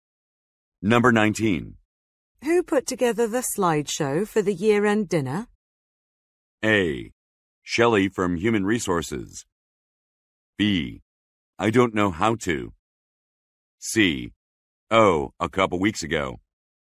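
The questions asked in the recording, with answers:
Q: Who put together the slideshow for the year-end dinner?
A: A: Shelley from Human Resources.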